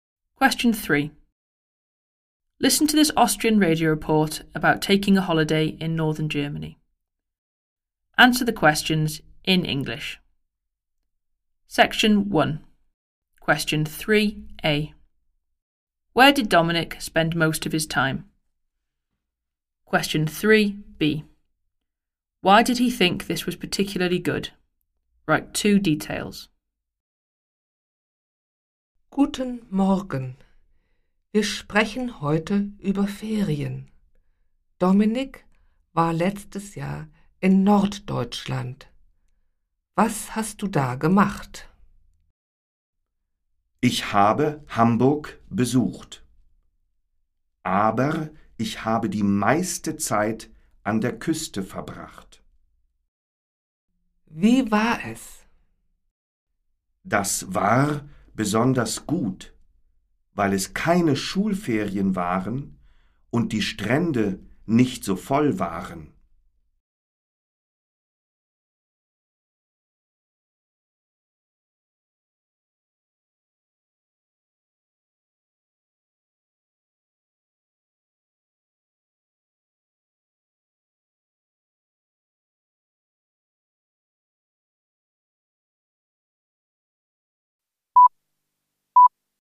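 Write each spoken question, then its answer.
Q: Where did Dominic spend most of his time?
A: On the coast

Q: Why did he think this was particularly good?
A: It wasn't the school holidays and the beaches weren't so full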